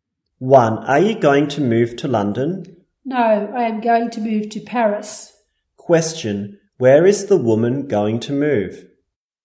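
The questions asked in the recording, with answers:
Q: Where is the woman going to move?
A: To Paris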